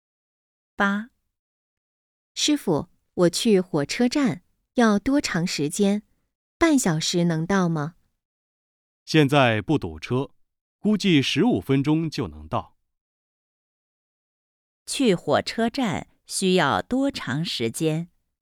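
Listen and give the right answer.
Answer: 十五分钟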